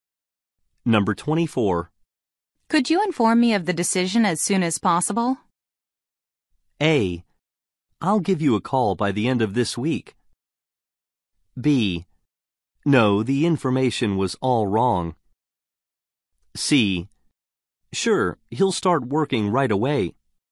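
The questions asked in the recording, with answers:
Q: Could you inform me of the decision as soon as possible?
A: A: I'll give you a call by the end of this week.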